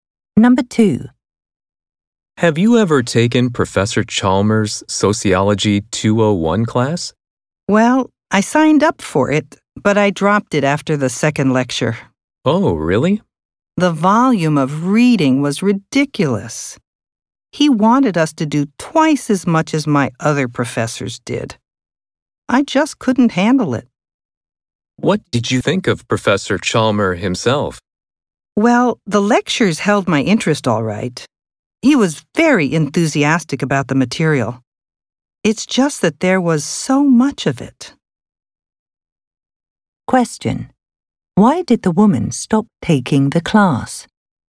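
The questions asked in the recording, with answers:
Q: Why did the woman stop taking the class?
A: There was too much reading.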